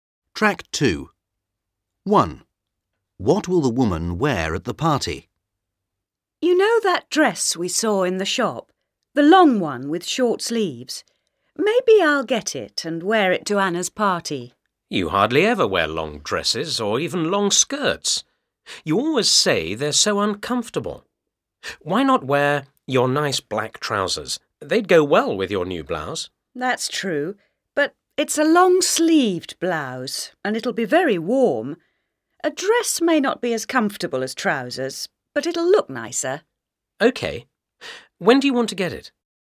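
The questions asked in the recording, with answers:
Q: What will the woman wear at the party?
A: The long dress with short sleeves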